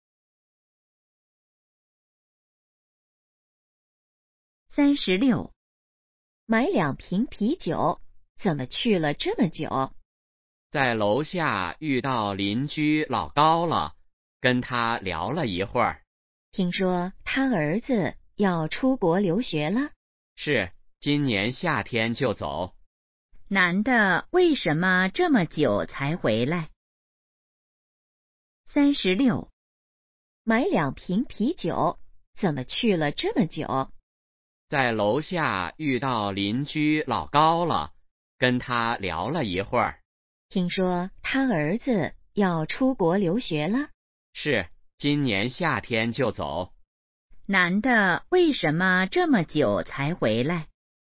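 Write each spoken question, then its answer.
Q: 男的为什么这么久才回来?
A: 在楼下跟邻居老高聊了一会儿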